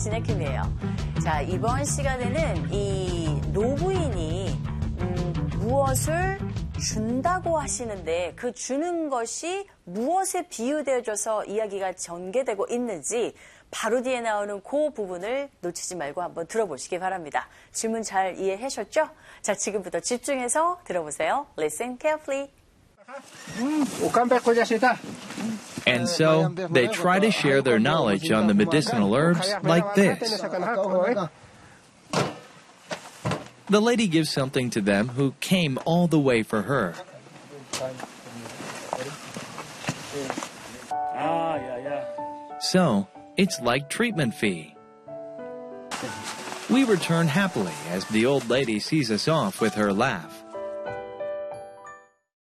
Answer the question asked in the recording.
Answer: It's like a treatment fee 라고 이 부분을 캐치하셨으면 됩니다.